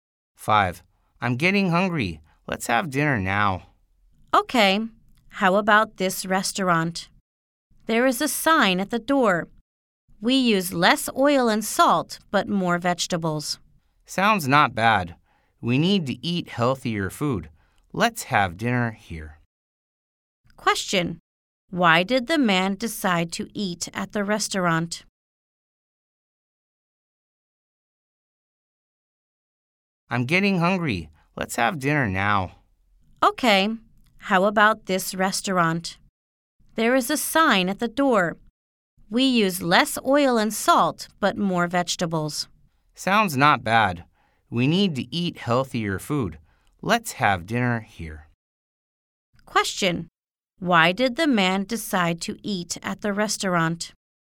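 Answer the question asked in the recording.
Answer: It uses less oil and salt and more vegetables, so the food is healthier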